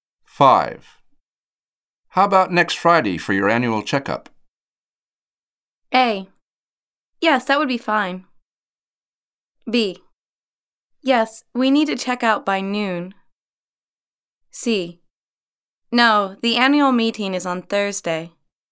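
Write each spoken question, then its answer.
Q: How about next Friday for your annual checkup?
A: A: Yes, that would be fine.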